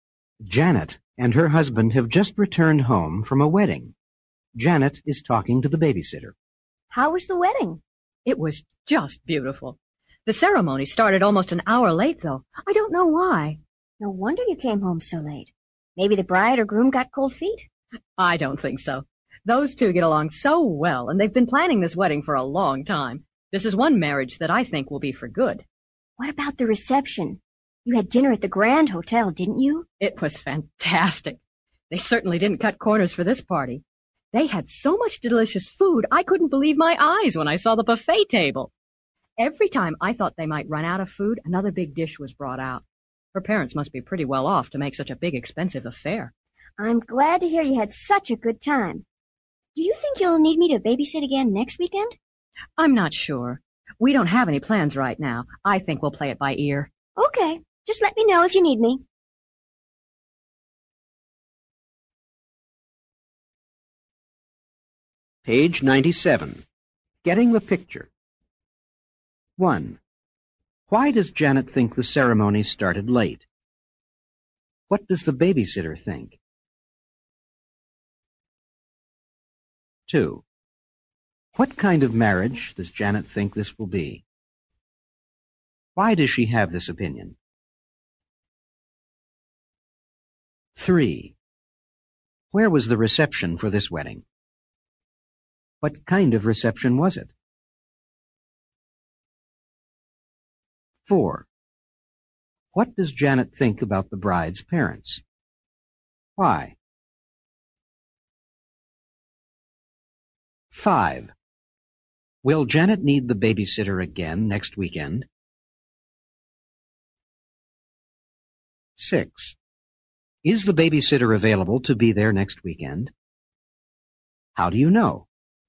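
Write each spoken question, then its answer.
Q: Why does Janet think the ceremony started late?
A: She doesn't know why.

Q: What does the babysitter think?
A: Maybe the bride or groom got cold feet.

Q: What kind of marriage does Janet think this will be?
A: One that will last for good

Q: Why does she have this opinion?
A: The two get along so well and planned the wedding for a long time.

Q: Where was the reception for this wedding?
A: At the Grand Hotel

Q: What kind of reception was it?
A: A big, expensive dinner party with a large buffet

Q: What does Janet think about the bride's parents?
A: They must be pretty well off.

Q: Will Janet need the babysitter again next weekend?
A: She isn't sure; they'll play it by ear.

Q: Is the babysitter available to be there next weekend?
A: Yes

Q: How do you know?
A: She says, "Just let me know if you need me."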